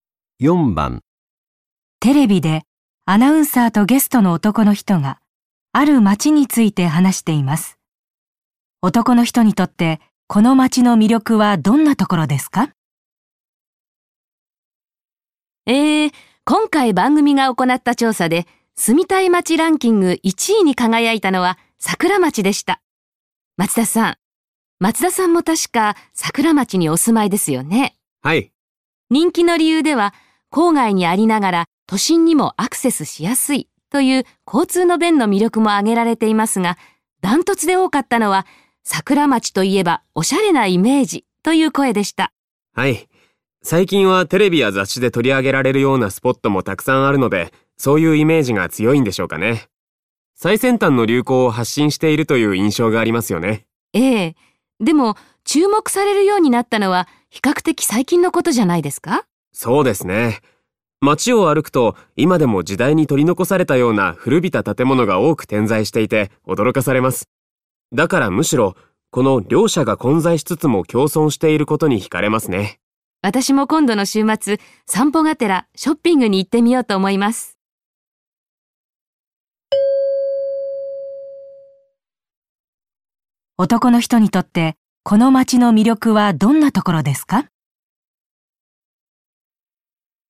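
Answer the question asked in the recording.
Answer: 古い建物と最先端の流行が混在しつつ共存しているところ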